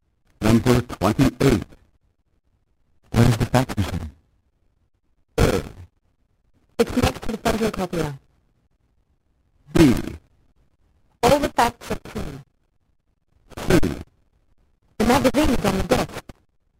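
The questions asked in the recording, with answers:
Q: Where is the fax machine?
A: A: It's next to the photocopier.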